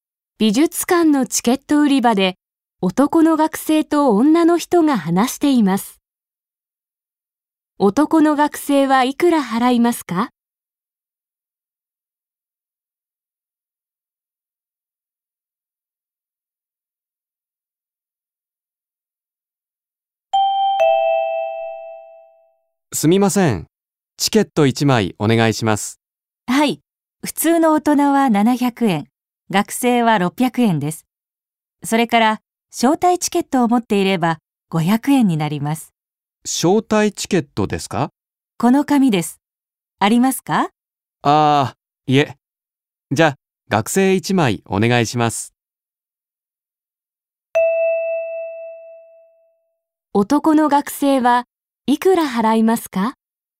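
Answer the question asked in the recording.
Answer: 600円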